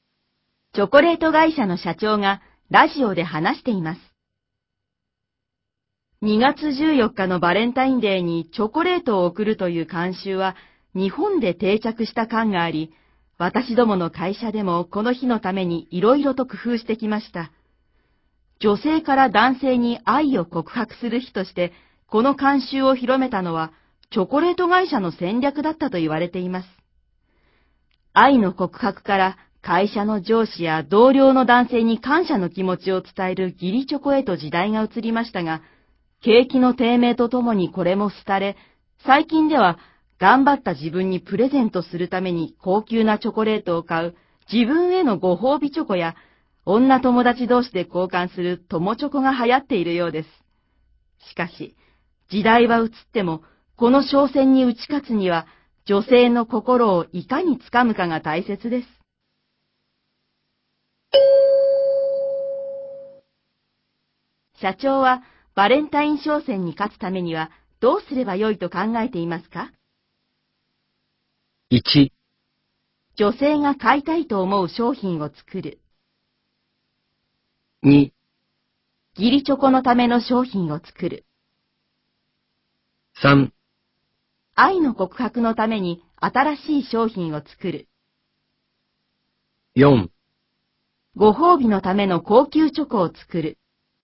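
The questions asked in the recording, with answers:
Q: 社長は、バレンタイン商戦に勝つためには、どうすればよいと考えていますか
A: 1: 女性が買いたいと思う商品を作る。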